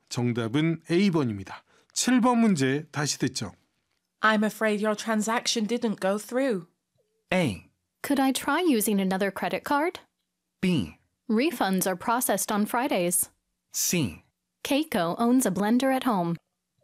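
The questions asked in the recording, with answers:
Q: I'm afraid your transaction didn't go through.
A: A: Could I try using another credit card?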